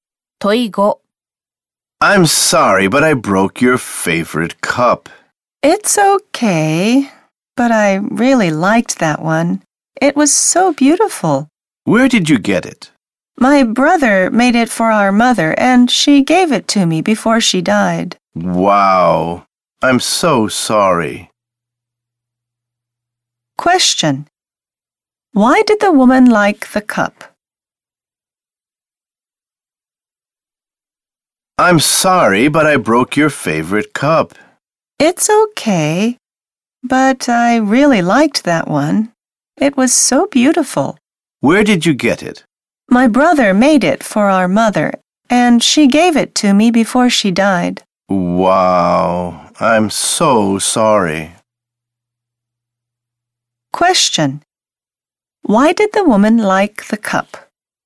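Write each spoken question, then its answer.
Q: Why did the woman like the cup?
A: It was beautiful, and her mother gave it to her (her brother made it).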